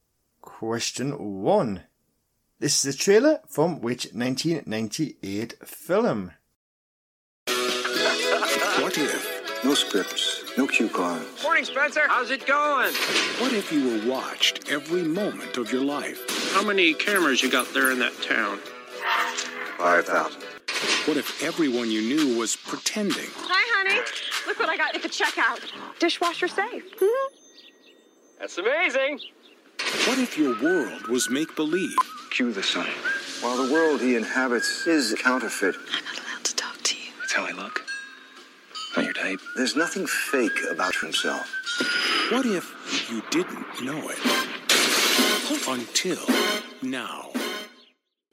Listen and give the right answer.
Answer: And that film was The Truman Show.